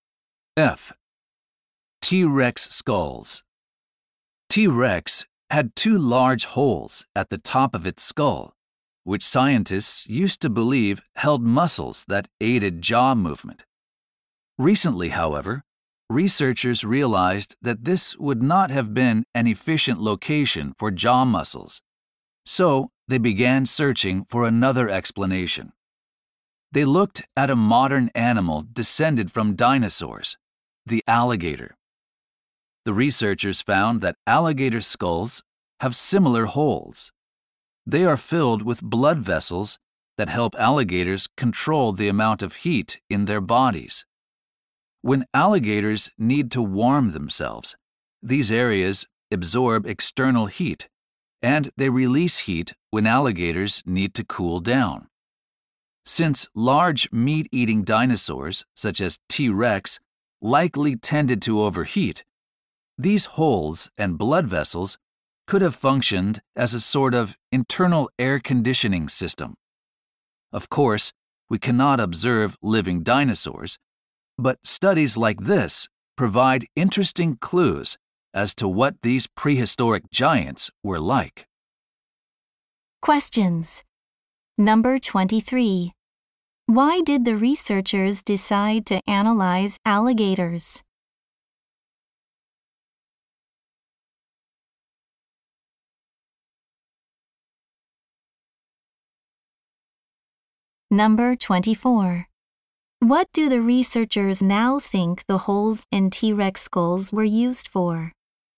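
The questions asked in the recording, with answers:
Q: What do the researchers now think the holes in T-Rex skulls were used for?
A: Controlling body temperature, like internal air conditioning.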